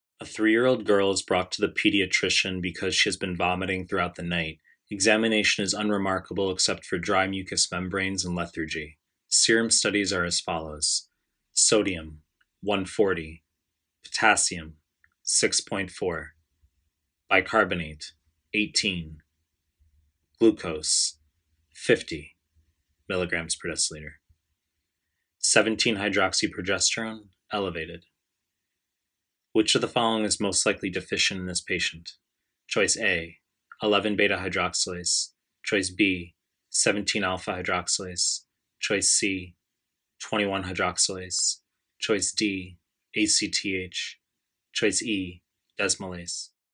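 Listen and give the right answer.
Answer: C: 21-hydroxylase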